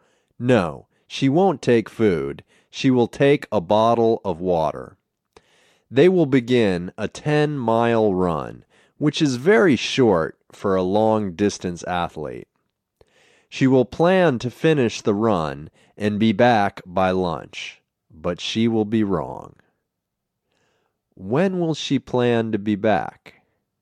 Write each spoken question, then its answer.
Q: When will she plan to be back?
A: She will plan to be back by lunch.